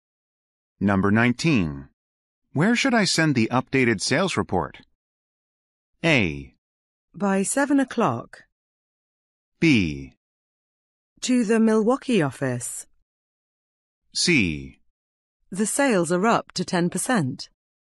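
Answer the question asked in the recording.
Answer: B: To the Milwaukee office.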